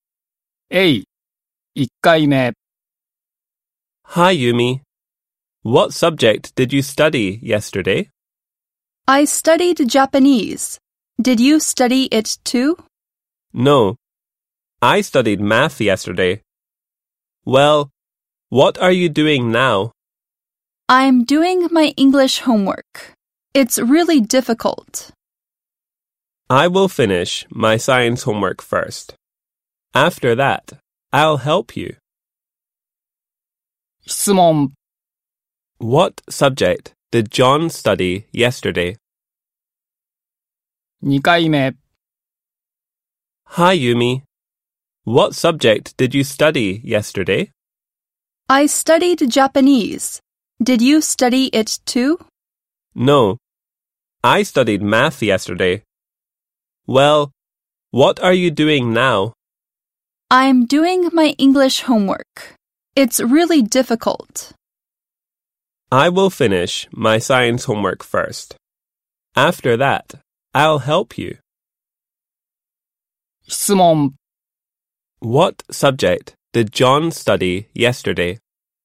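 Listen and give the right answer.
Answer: Math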